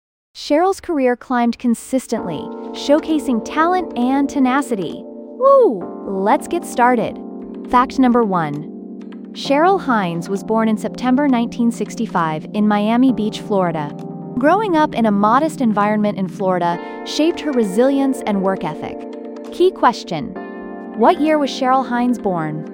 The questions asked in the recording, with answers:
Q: what year was Cheryl Hines born?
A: 1965.